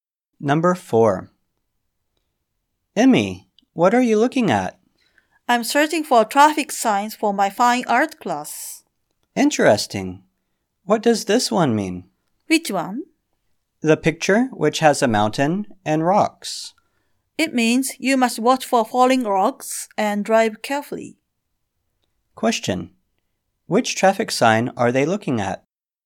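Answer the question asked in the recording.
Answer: The falling rocks sign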